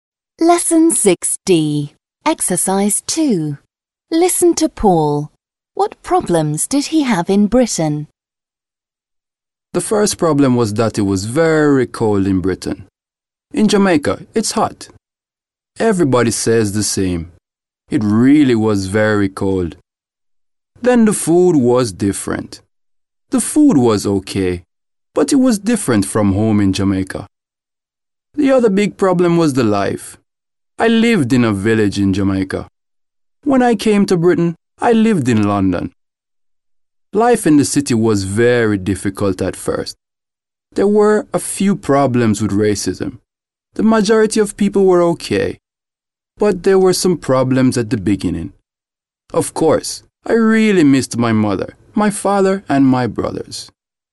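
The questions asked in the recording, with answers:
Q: What problems did he have in Britain?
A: The cold, different food, city life in London, some racism, and missing his family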